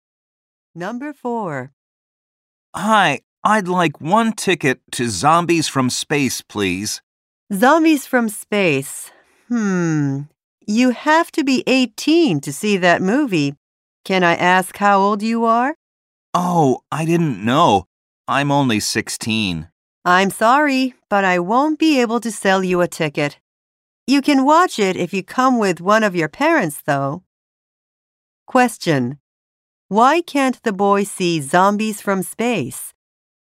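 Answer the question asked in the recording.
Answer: He is under 18.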